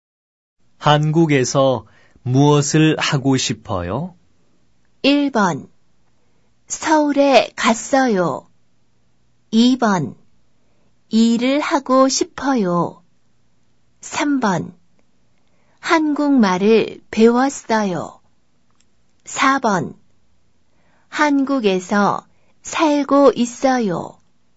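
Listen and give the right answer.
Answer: 2: 일을 하고 싶어요.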